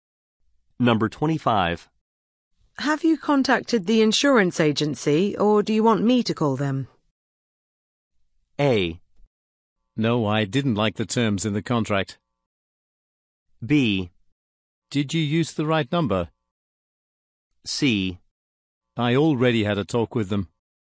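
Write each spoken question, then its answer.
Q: Have you contacted the insurance agency, or do you want me to call them?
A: C: I already had a talk with them.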